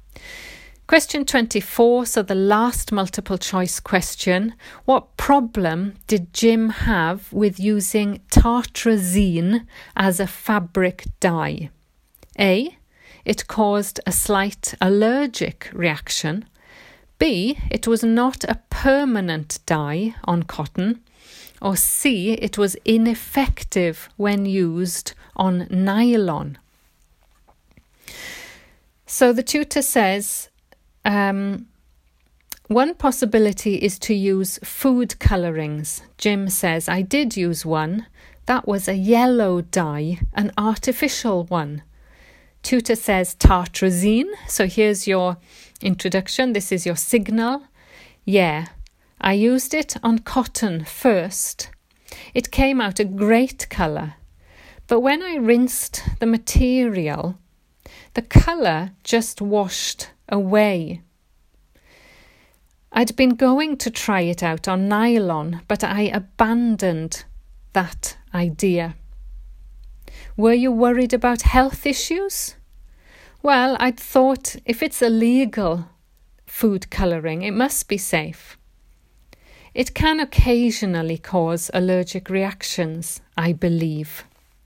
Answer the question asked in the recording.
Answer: So the answer, it was not a permanent dye on cotton.